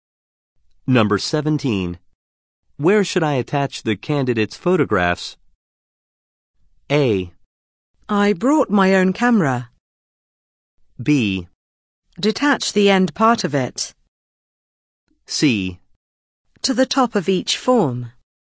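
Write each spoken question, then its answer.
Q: Where should I attach the candidate's photographs?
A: C: To the top of each form.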